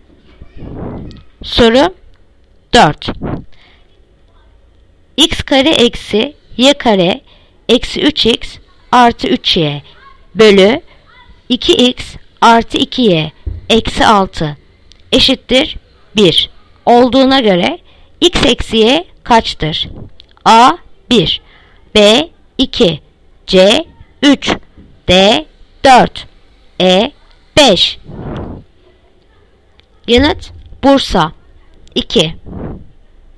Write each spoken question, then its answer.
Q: X kare eksi y kare eksi 3x artı 3y bölü 2x artı 2y eksi 6 eşittir 1 olduğuna göre x eksi y kaçtır?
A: Yanıt Bursa 2.